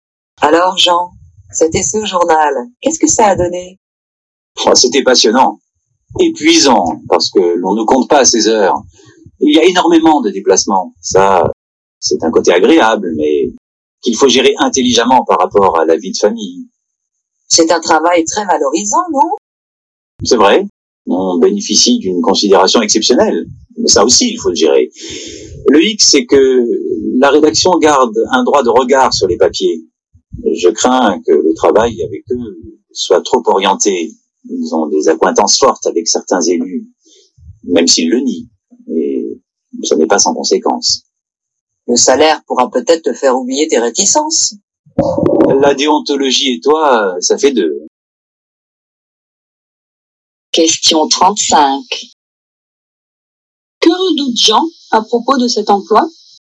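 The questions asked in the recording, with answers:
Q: Que redoute Jean à propos de cet emploi ?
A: Que le travail soit trop orienté politiquement (manque d'indépendance vis-à-vis de la rédaction et des élus)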